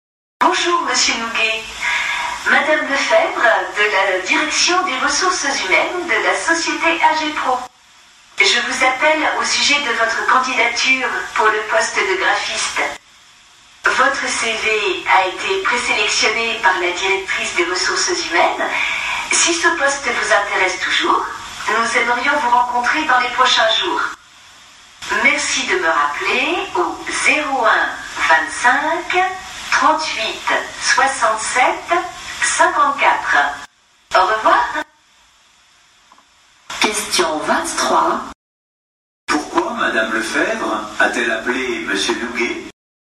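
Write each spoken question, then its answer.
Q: Pourquoi Madame Lefebvre a-t-elle appelé Monsieur Nouguet ?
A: Pour lui proposer un entretien (rencontre) au sujet de sa candidature au poste de graphiste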